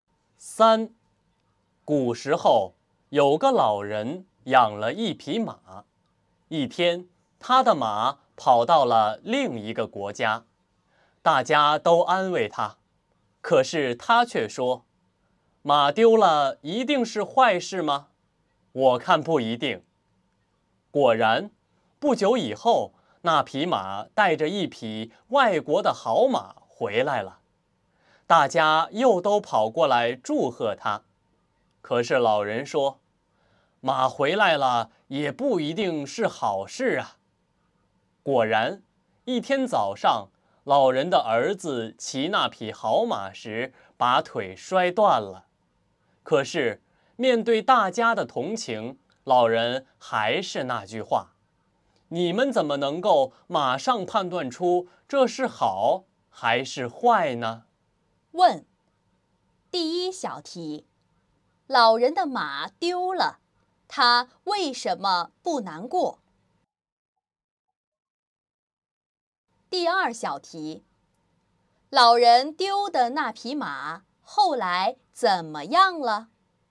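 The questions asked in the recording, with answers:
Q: 老人的马丢了,他为什么不难过?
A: 他认为马丢了不一定是坏事

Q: 老人丢的那匹马后来怎么样了?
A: 带着一匹外国的好马回来了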